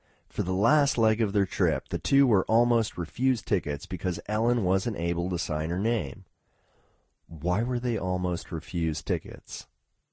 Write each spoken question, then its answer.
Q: Why were they almost refused tickets?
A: They were almost refused tickets because Ellen wasn't able to sign her name.